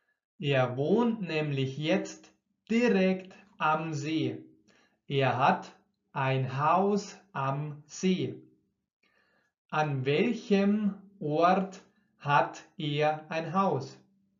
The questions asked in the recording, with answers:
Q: An welchem Ort hat er ein Haus?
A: am See.